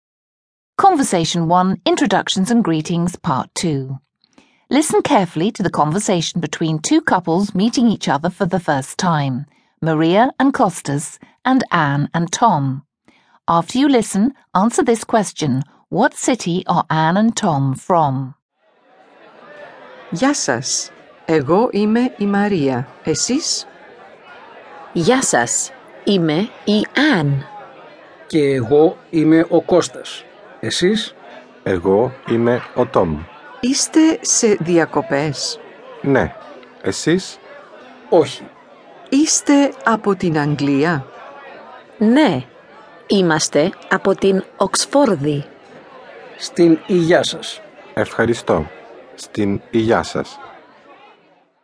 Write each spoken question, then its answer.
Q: what city are Anne and Tom from?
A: That's correct, Oxford. They're from Oxford, England.